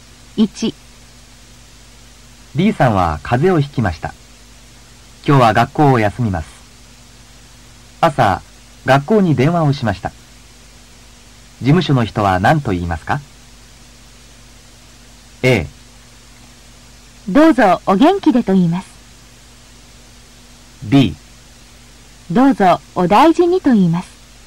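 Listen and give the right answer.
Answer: B: どうぞお大事にと言います。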